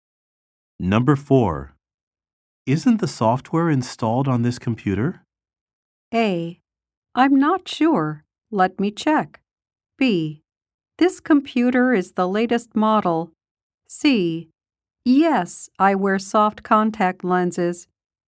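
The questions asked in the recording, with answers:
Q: Isn't the software installed on this computer?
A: A: I'm not sure. Let me check.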